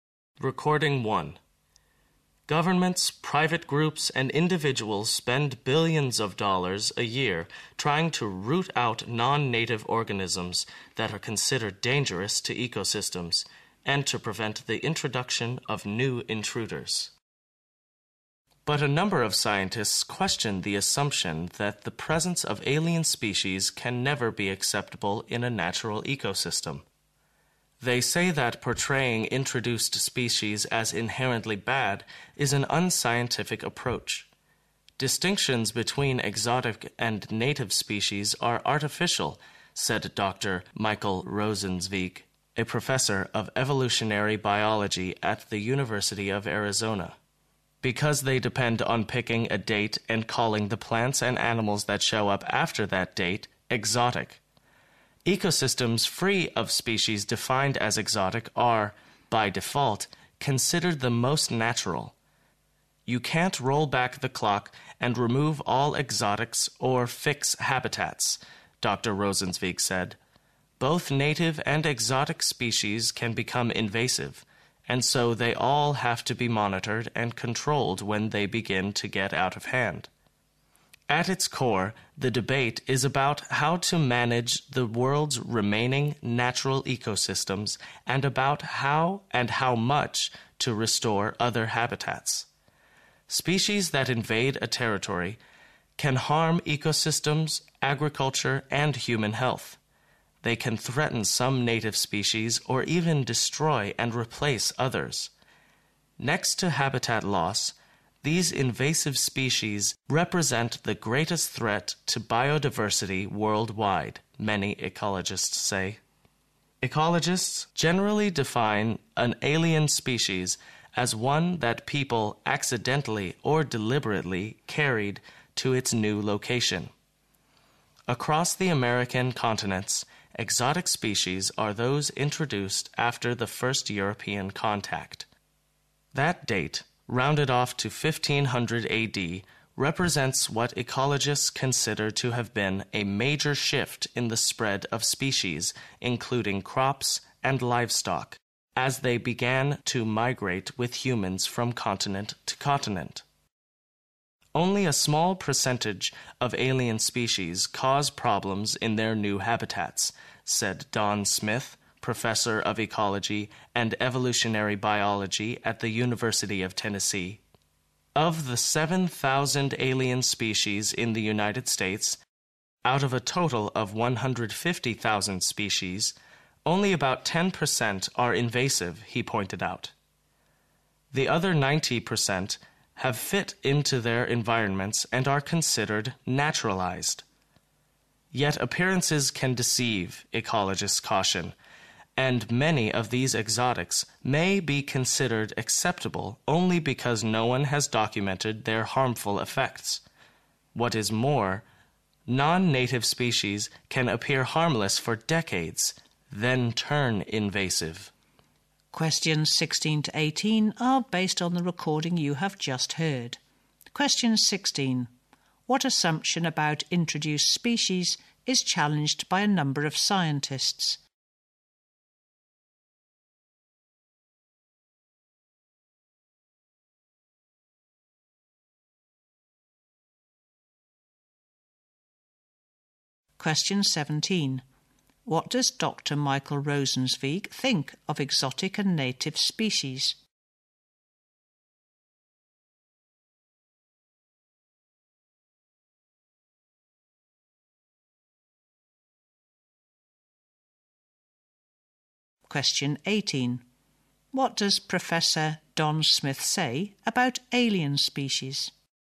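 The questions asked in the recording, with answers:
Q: What assumption about introduced species is challenged by a number of scientists?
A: That the presence of alien species can never be acceptable in a natural ecosystem

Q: What does Dr. Michael Rosenzweig think of exotic and native species?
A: The distinction between them is artificial

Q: What does Professor Don Smith say about alien species?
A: Only a small percentage of them cause problems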